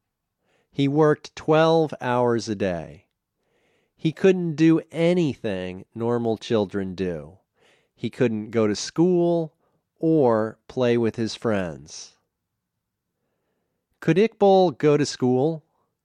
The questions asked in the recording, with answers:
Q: Could Iqbal go to school?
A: No, he couldn't go to school.